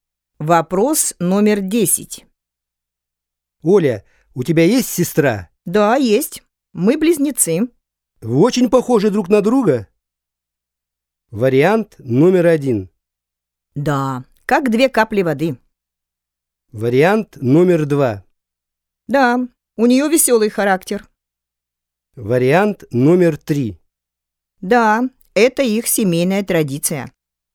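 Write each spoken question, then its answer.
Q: Вы очень похожи друг на друга?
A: 1: Да, как две капли воды.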